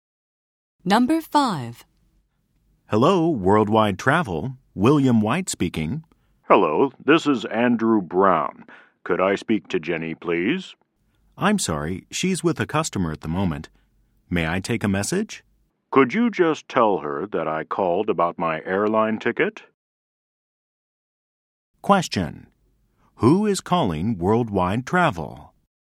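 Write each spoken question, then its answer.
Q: Who is calling Worldwide Travel?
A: Andrew Brown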